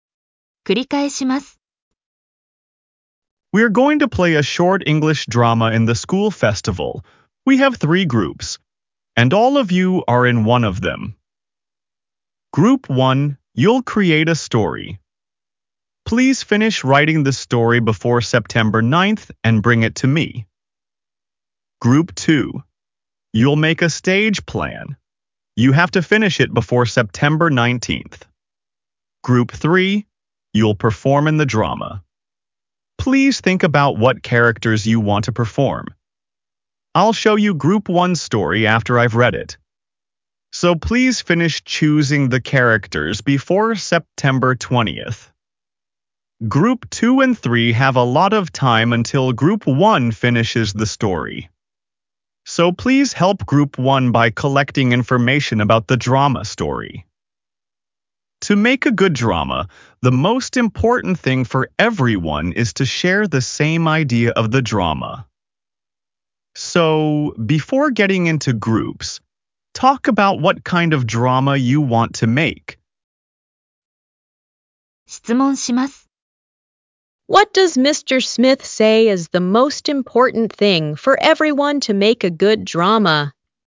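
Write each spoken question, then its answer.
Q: What does Mr. Smith say is the most important thing for everyone to make a good drama?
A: To share the same idea of the drama.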